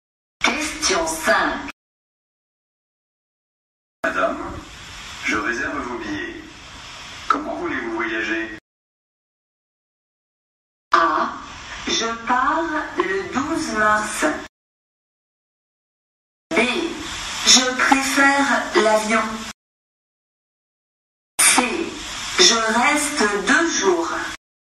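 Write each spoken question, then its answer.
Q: Comment voulez-vous voyager?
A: B: Je préfère l'avion.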